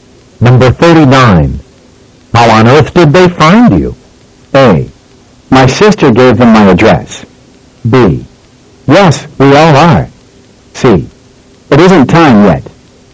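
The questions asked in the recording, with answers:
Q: How on earth did they find you?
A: A: My sister gave them my address.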